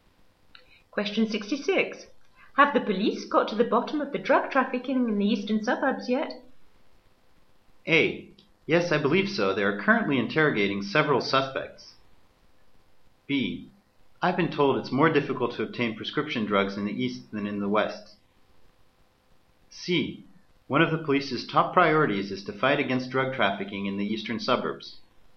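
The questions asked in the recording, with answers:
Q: Have the police got to the bottom of the drug trafficking in the eastern suburbs yet?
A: A: Yes, I believe so. They are currently interrogating several suspects.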